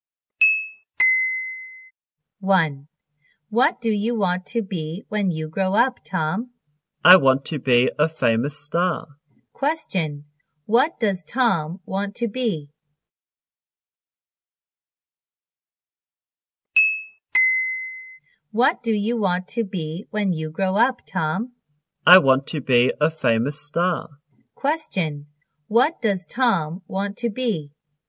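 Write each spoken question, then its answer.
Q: What does Tom want to be?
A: A famous star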